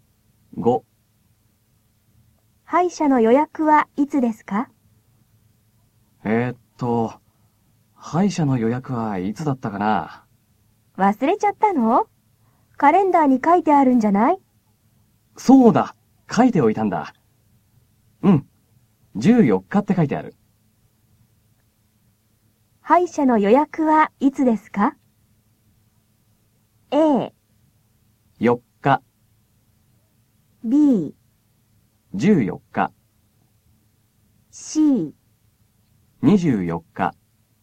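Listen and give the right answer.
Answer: B: 14日。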